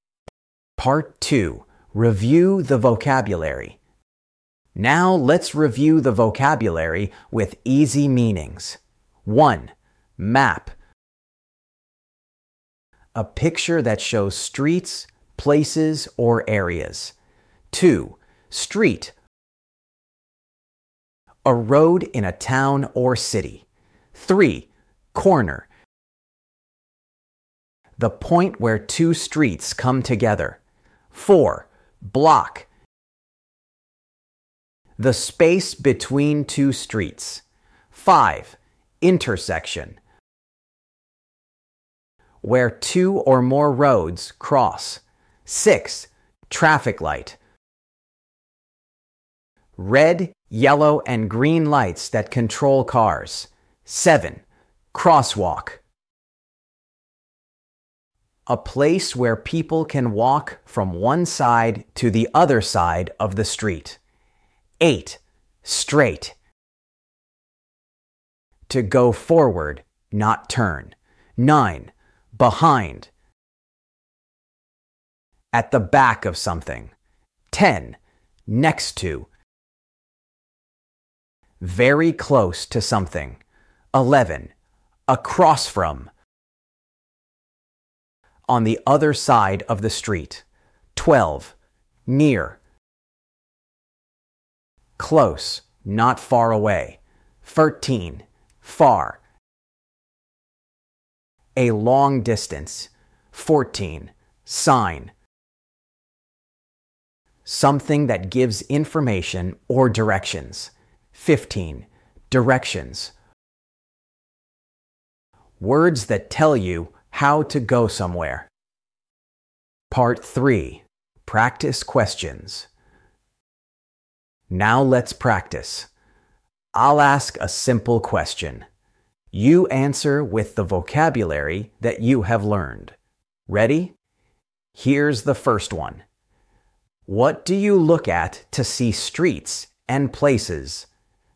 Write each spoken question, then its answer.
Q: What do you look at to see streets and places?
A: Map. Yes. A map helps you know where you are.